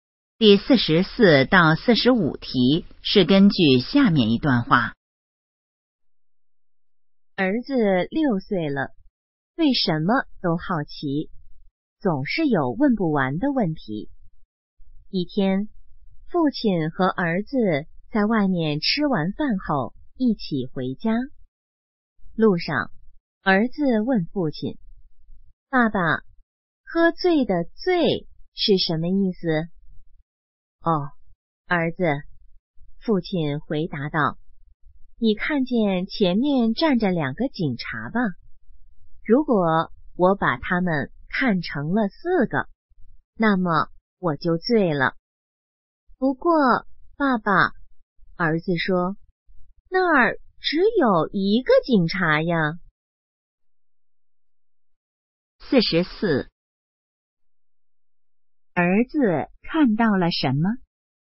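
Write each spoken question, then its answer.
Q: 儿子看到了什么?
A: 一个警察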